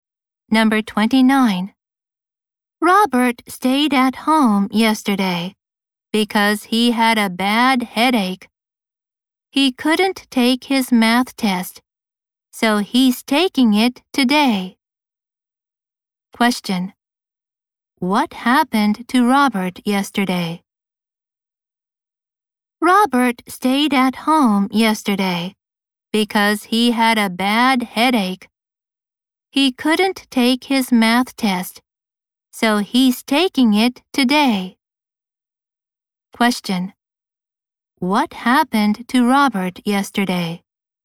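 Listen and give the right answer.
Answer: He had a bad headache and stayed at home.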